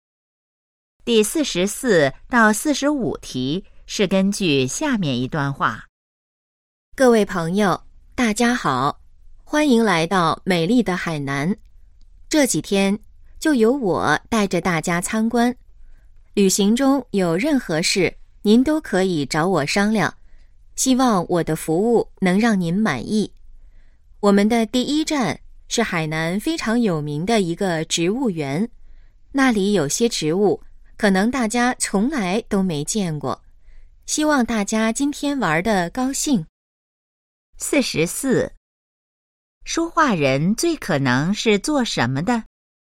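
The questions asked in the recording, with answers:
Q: 说话人最可能是做什么的?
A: 导游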